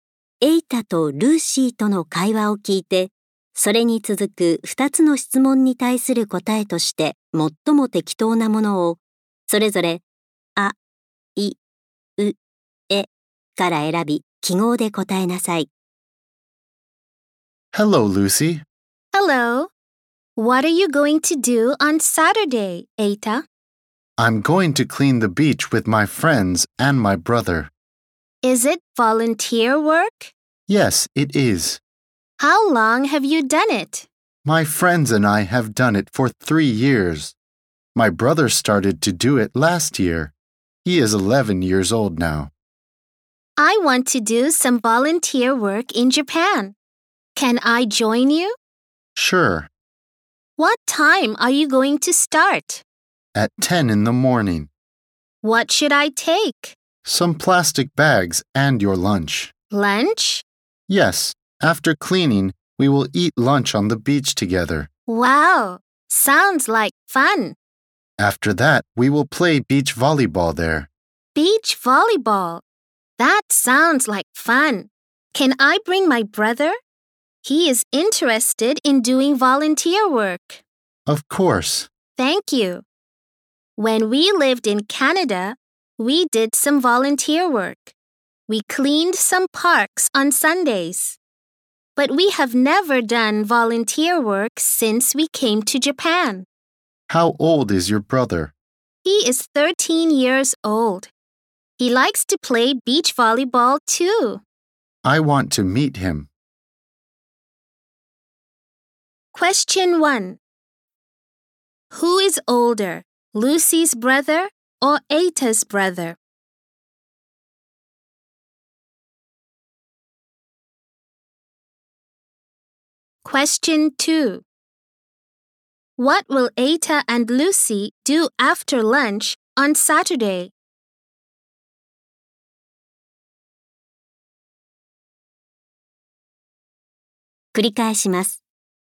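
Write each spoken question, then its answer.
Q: Who is older, Lucy's brother or Eita's brother?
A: Lucy's brother

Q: What will Eita and Lucy do after lunch on Saturday?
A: Play beach volleyball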